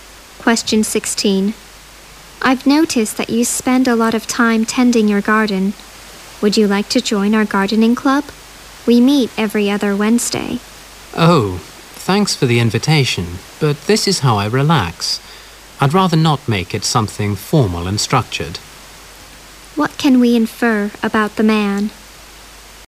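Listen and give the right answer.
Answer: He gardens to relax and doesn't want to join the club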